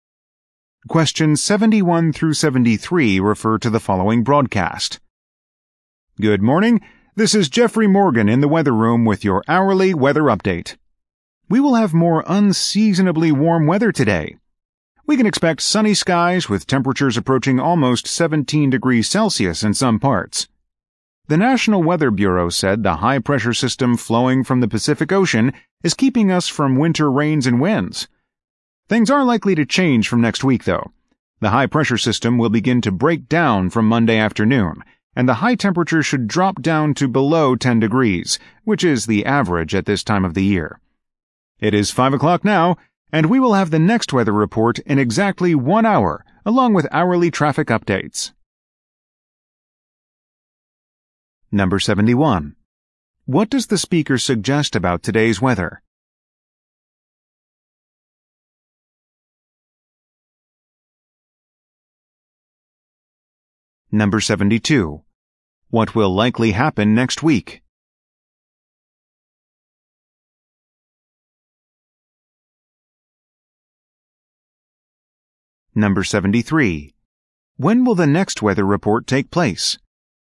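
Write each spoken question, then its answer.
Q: What does the speaker suggest about today's weather?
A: It will be unseasonably warm and sunny

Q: What will likely happen next week?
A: Temperatures will drop

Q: When will the next weather report take place?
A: At 6 o'clock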